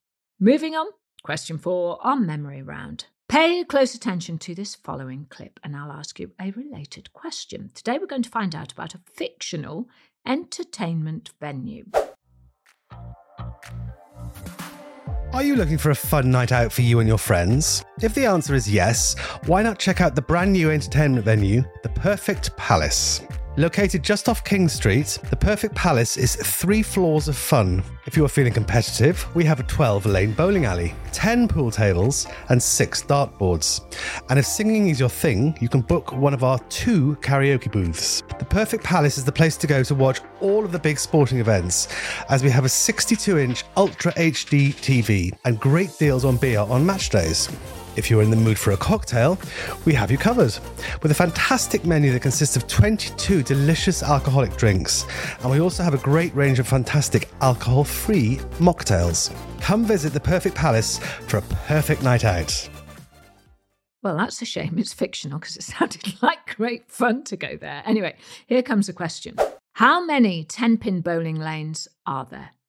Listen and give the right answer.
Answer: And the answer was 12 10 bowling lanes.